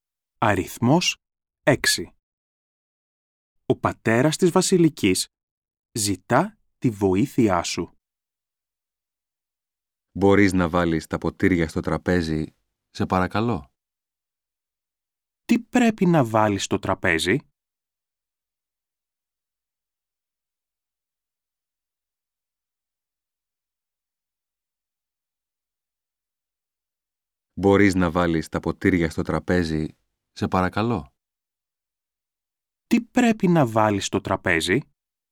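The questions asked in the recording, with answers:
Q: Τι πρέπει να βάλεις στο τραπέζι?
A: Τα ποτήρια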